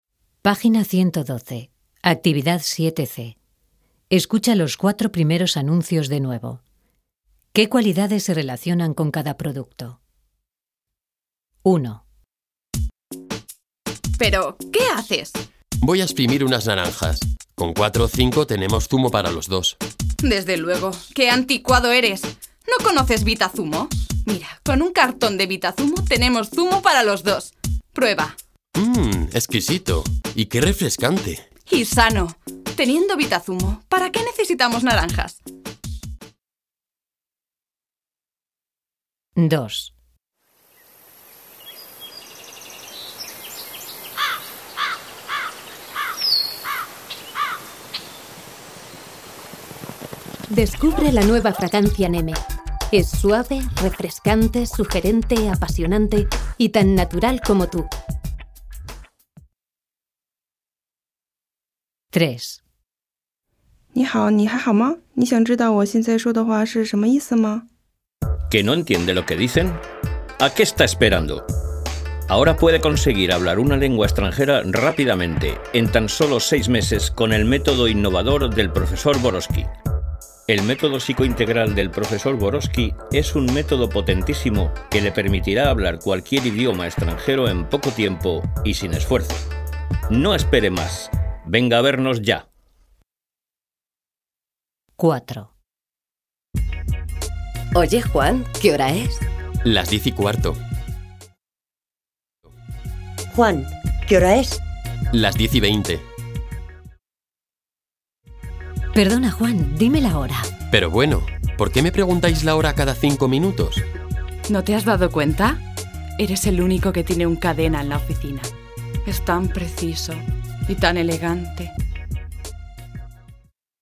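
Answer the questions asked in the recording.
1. Vitazumo: exquisito, refrescante, sano
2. Fragancia Neme: suave, refrescante, sugerente, apasionante, natural
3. Método Borowski: rápido, innovador, potentísimo, sin esfuerzo
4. Reloj: preciso, elegante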